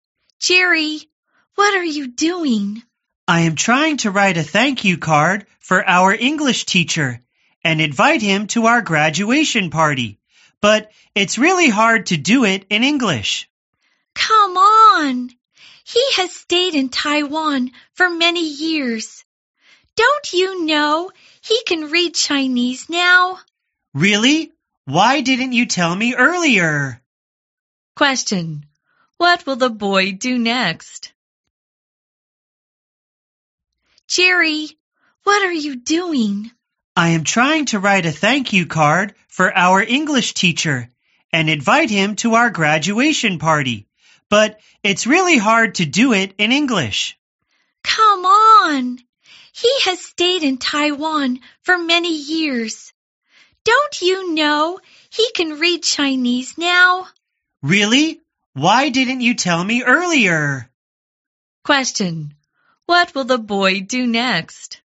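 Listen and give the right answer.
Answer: Write the thank-you card in Chinese.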